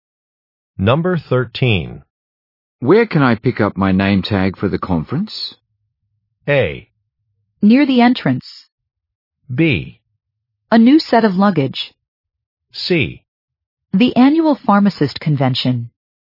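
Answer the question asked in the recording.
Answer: A: Near the entrance.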